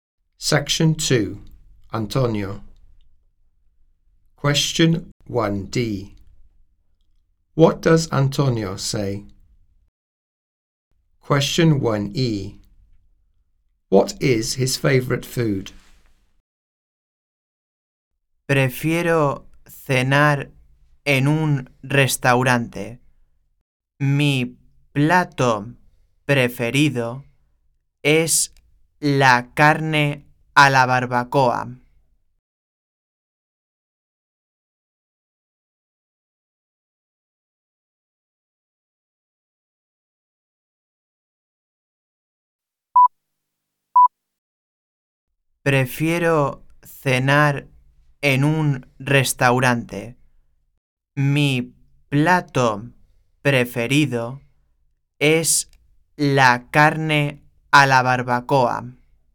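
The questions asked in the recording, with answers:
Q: What does Antonio say?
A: He prefers to have dinner in a restaurant

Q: What is his favorite food?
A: Barbecued meat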